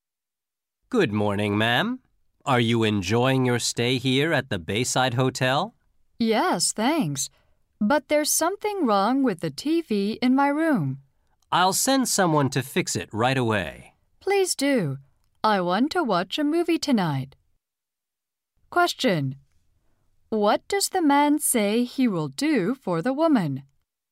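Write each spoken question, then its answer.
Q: What does the man say he will do for the woman?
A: Send someone to fix her TV.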